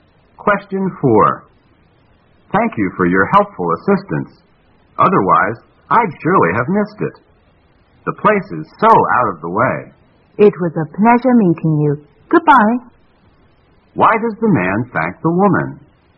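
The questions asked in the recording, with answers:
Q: Why does the man thank the woman?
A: She helped him find a place that was hard to find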